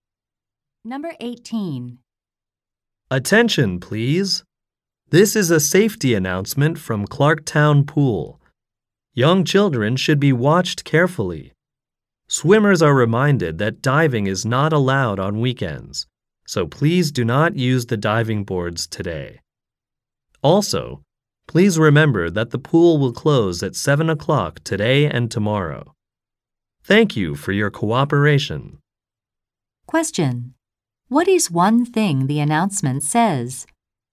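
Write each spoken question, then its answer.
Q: What is one thing the announcement says?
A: Diving is not allowed on weekends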